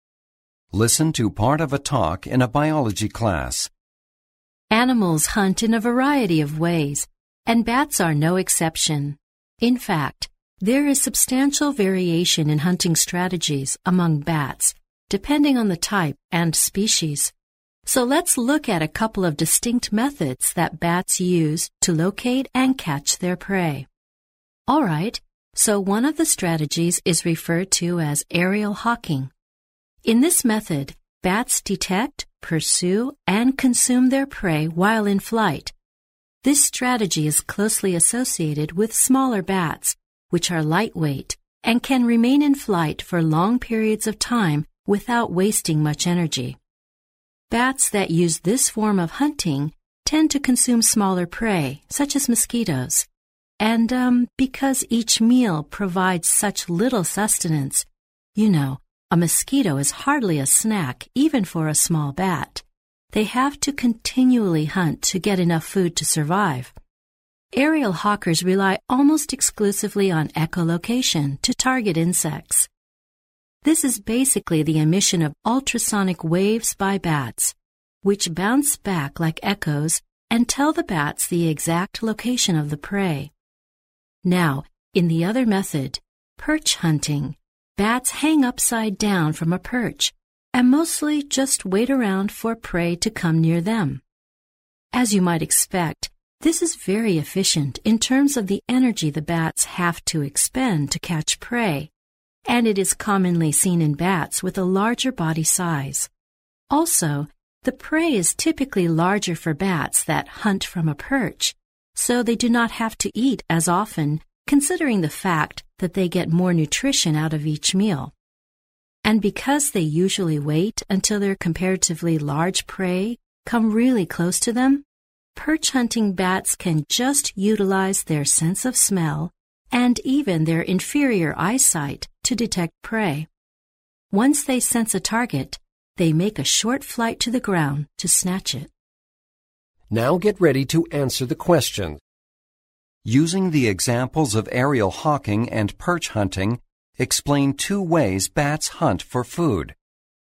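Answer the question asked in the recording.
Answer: Aerial hawking: small bats hunt in flight, eat small prey like mosquitoes, hunt all the time, and find prey by echolocation. Perch hunting: larger bats hang from a perch and wait, which saves energy; they catch larger prey, eat less often, find it by smell and sight, and then fly down briefly to grab it.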